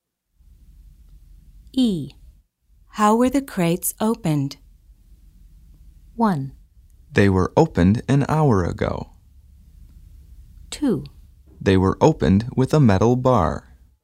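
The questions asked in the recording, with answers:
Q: How were the crates opened?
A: 2: They were opened with a metal bar.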